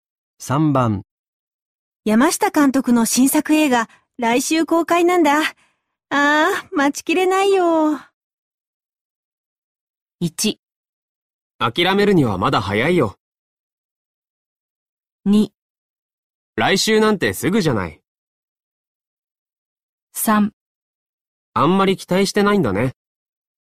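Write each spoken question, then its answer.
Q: 山下監督の新作映画、来週公開なんだ。ああ、待ちきれないよ。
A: 2: 来週なんてすぐじゃない。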